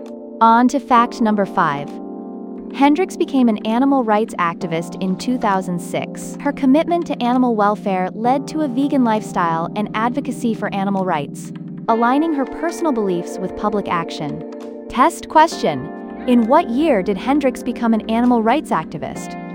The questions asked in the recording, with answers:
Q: in what year did Hendricks become an animal rights activist?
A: 2006.